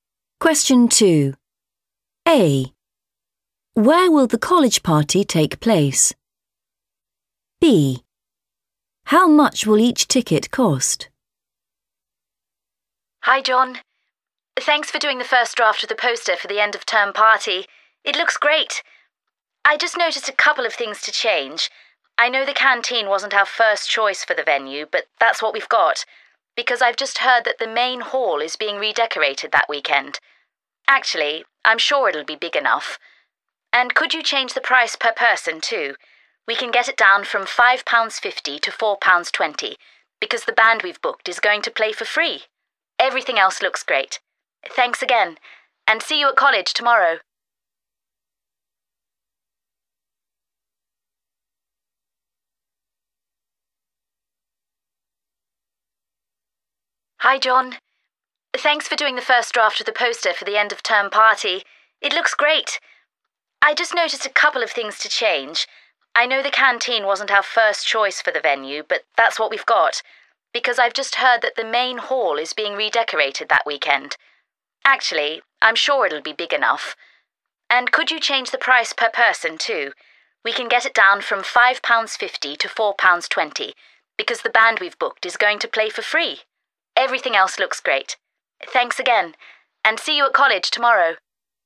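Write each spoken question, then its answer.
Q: Where will the college party take place?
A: the canteen

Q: How much will each ticket cost?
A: £4.20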